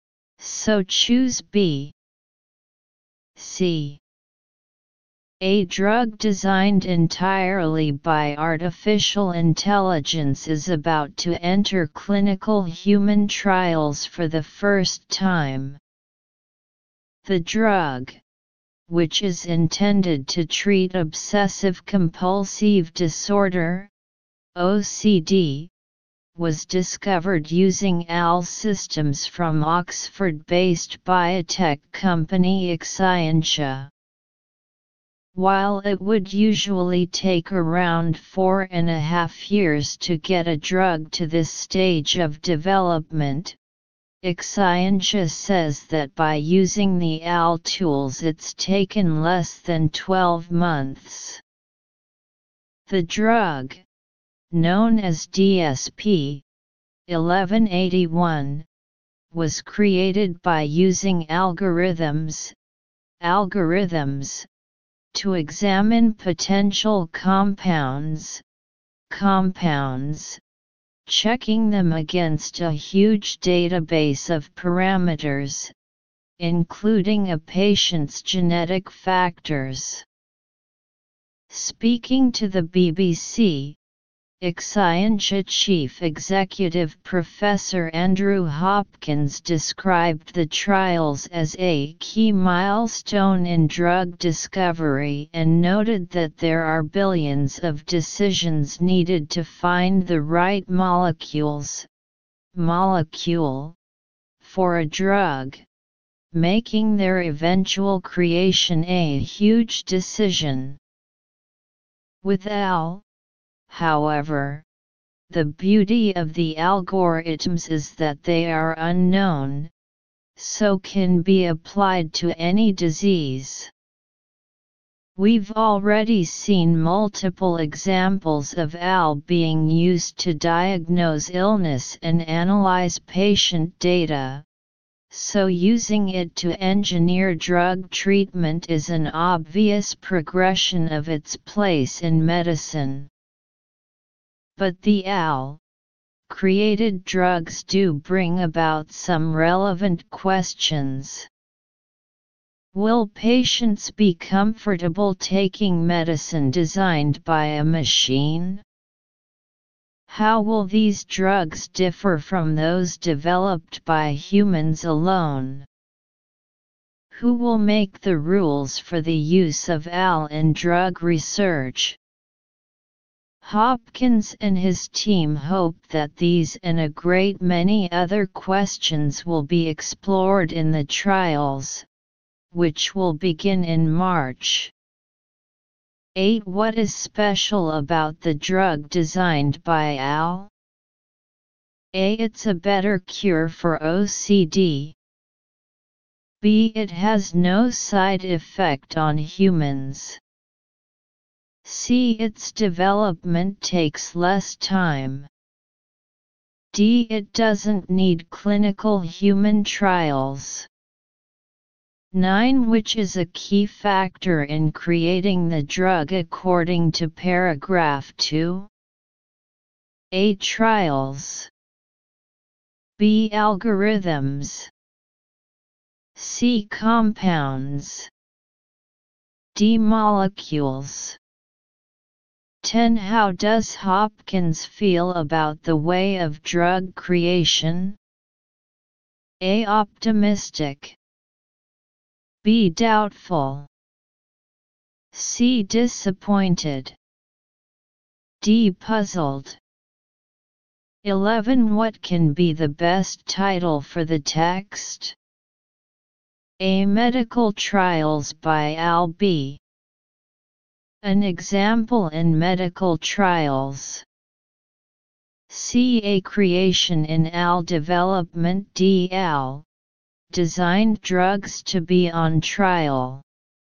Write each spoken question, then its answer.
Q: What is special about the drug designed by AL?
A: 8. C.

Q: Which is a key factor in creating the drug according to paragraph 2?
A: 9. B.

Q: How does Hopkins feel about the way of drug creation?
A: 10. A.

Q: What can be the best title for the text?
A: 11. D.